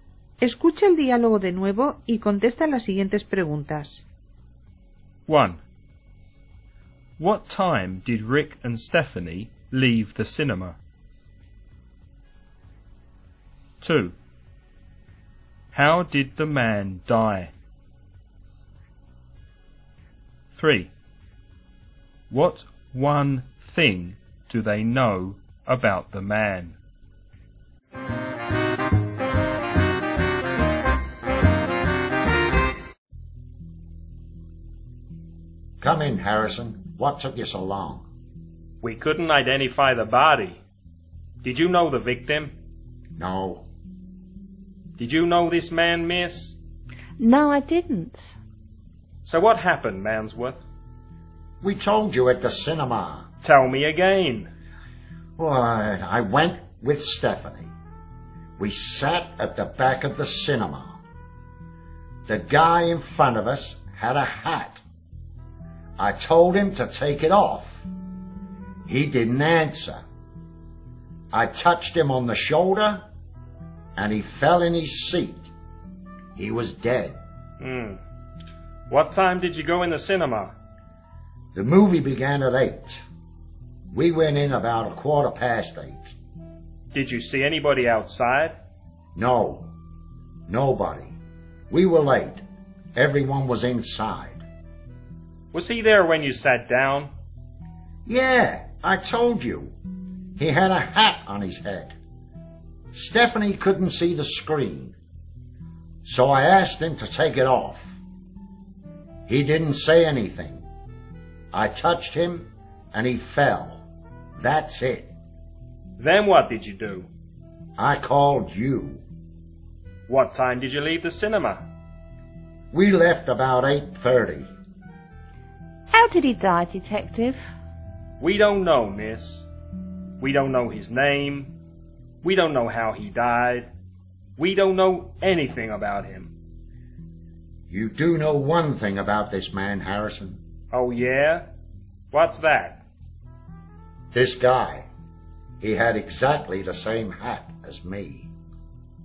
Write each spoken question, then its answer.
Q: What time did Rick and Stephanie leave the cinema?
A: They left about 8:30.

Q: How did the man die?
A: They don't know.

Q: What one thing do they know about the man?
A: He had exactly the same hat as Rick.